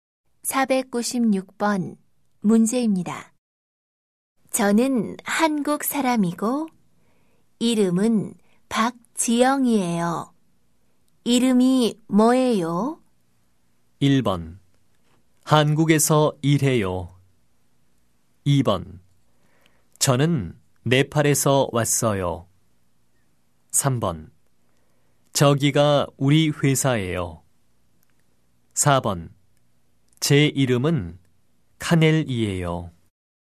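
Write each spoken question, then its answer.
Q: 이름이 뭐예요?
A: 4: 제 이름은 카넬이에요.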